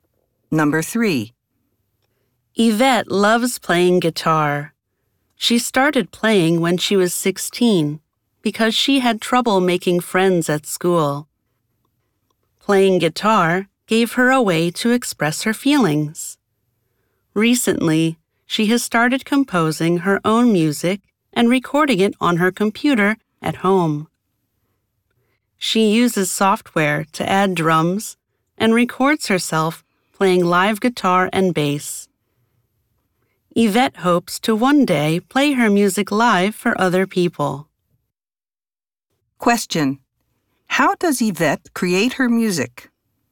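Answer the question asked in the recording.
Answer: She records it on her home computer, using software to add drums and recording herself playing live guitar and bass.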